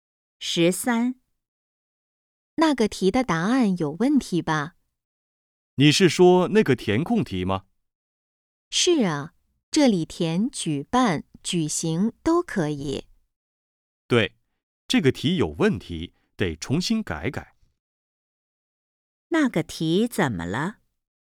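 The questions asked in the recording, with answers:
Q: 那个题怎么了?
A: 答案有问题,得重新改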